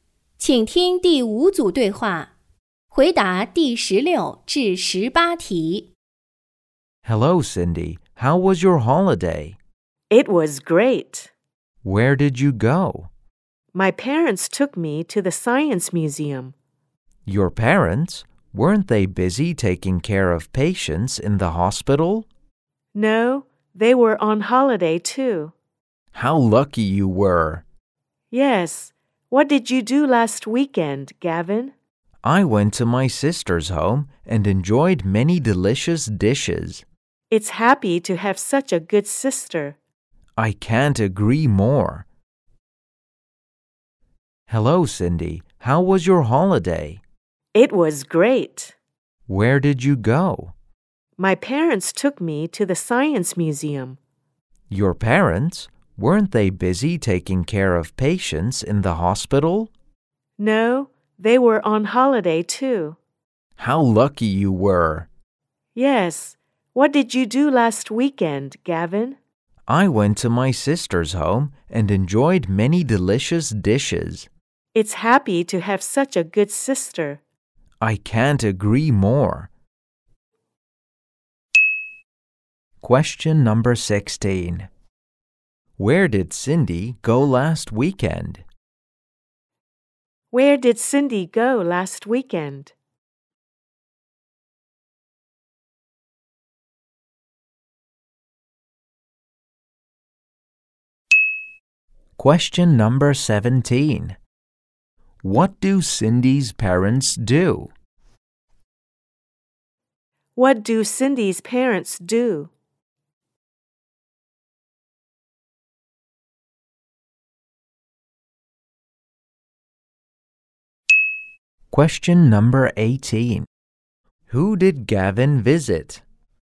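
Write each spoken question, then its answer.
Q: Where did Cindy go last weekend?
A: The Science Museum

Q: Who did Gavin visit?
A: His sister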